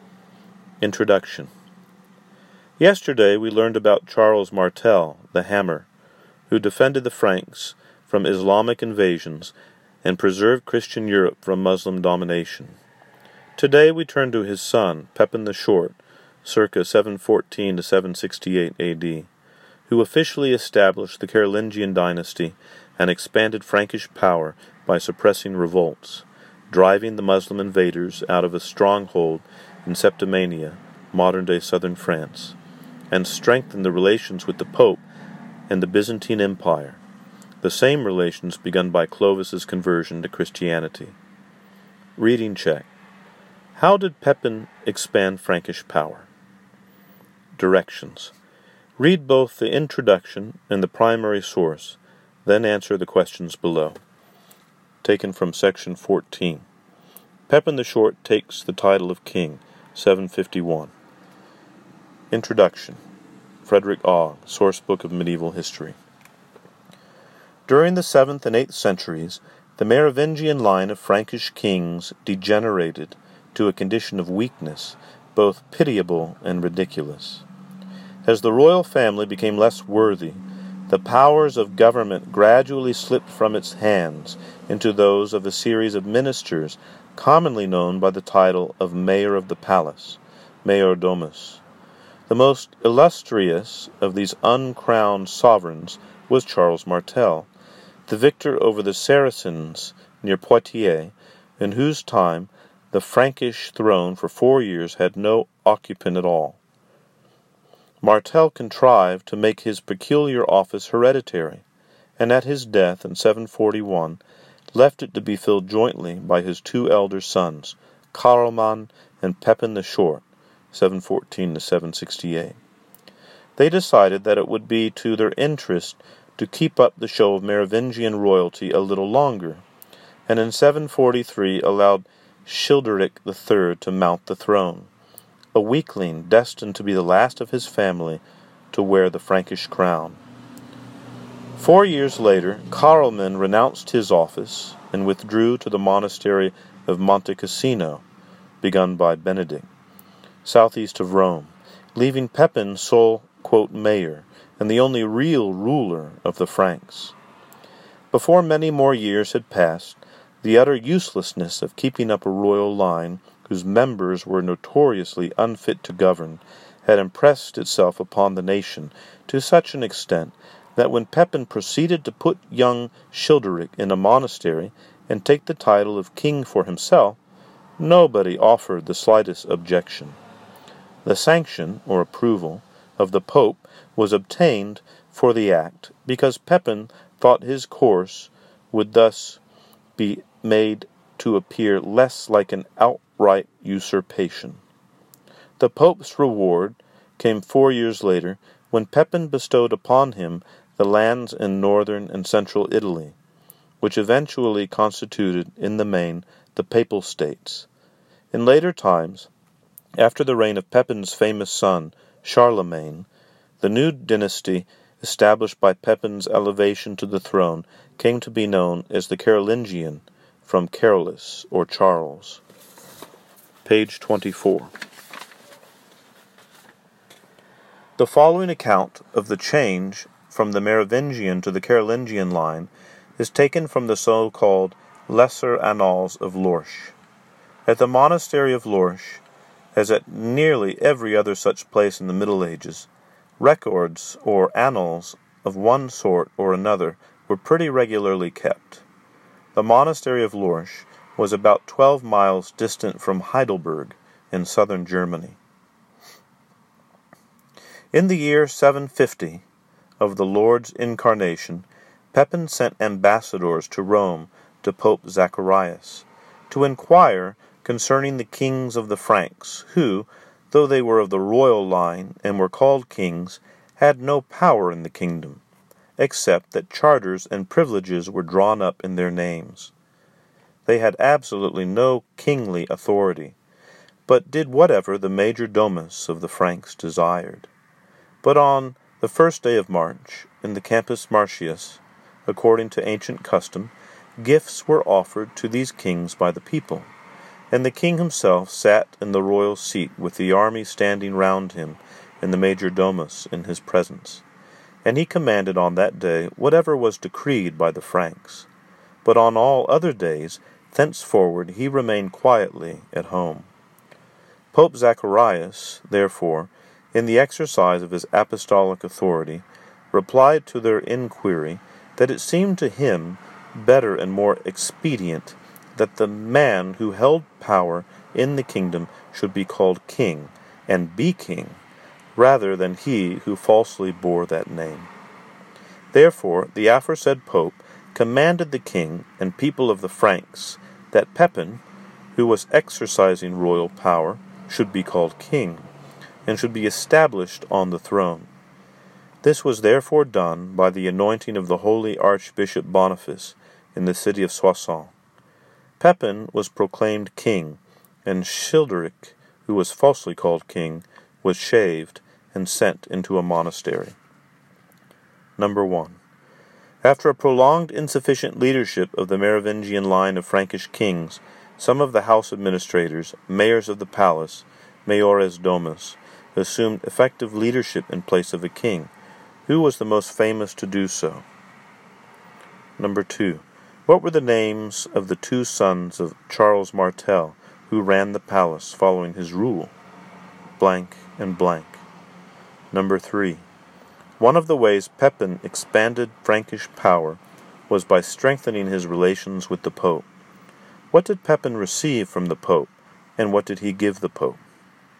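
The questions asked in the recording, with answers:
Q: How did Pepin expand Frankish power?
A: He put down revolts, drove the Muslim invaders out of Septimania, and strengthened relations with the Pope and the Byzantine Empire

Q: Who was the most famous to do so?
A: Charles Martel

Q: What were the names of the two sons of Charles Martel, who ran the palace following his rule?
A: Carloman and Pepin the Short

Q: What did Pepin receive from the Pope, and what did he give the Pope?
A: He received the Pope's approval to become king, and he gave the Pope lands in northern and central Italy (later the Papal States)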